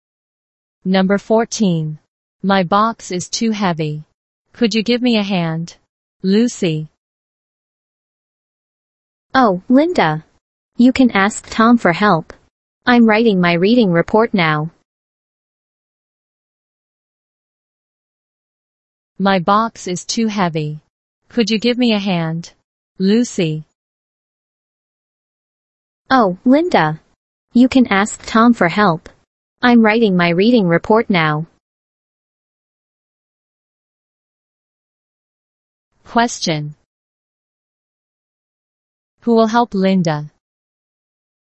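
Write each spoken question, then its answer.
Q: Who will help Linda?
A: Tom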